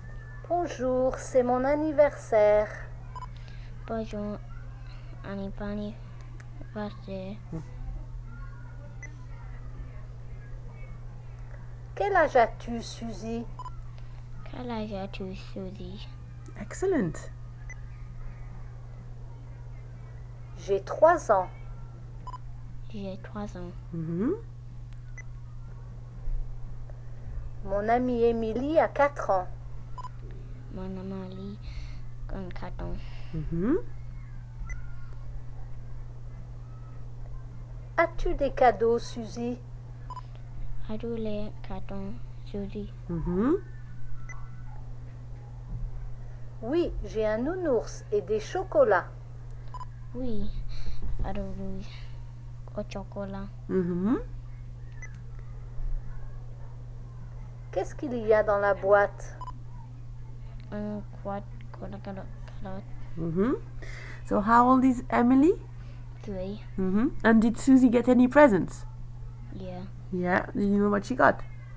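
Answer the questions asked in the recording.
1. Four
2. Yeah.
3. A teddy bear and chocolates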